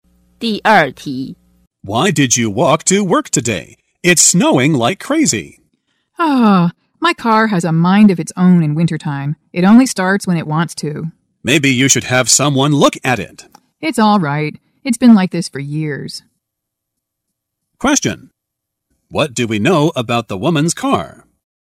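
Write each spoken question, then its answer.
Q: What do we know about the woman's car?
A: It often won't start in winter.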